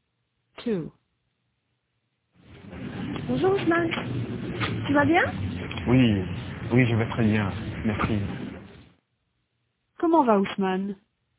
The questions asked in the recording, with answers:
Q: Comment va Ousmane?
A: Il va bien.